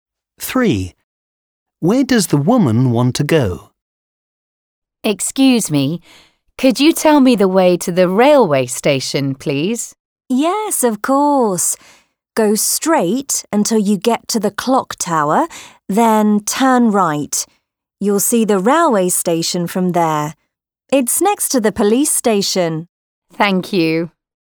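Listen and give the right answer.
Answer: The railway station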